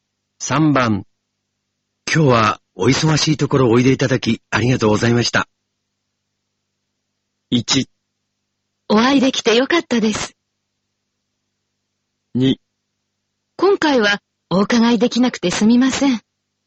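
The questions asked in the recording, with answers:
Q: 今日はお忙しいところおいでいただきありがとうございました。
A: 1: お会いできてよかったです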